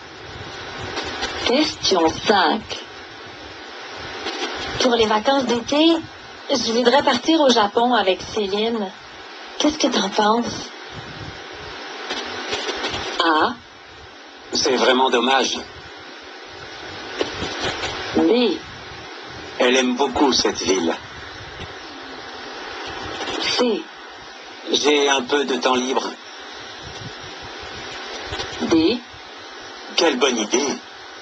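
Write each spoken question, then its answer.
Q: Qu'est-ce que t'en penses?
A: D: Quelle bonne idée!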